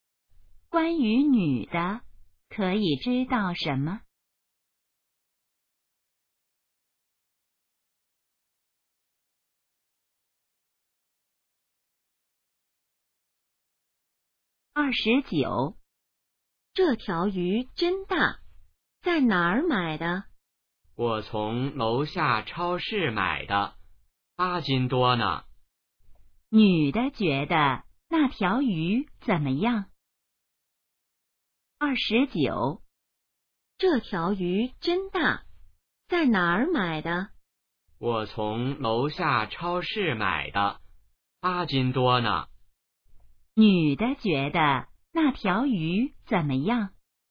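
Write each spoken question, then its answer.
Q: 女的觉得那条鱼怎么样?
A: 很大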